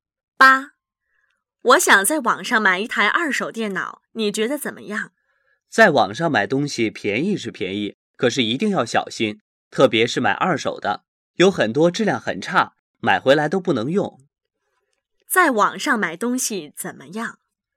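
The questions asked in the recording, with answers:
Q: 在网上买东西怎么样?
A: 便宜,但要小心,二手的很多质量很差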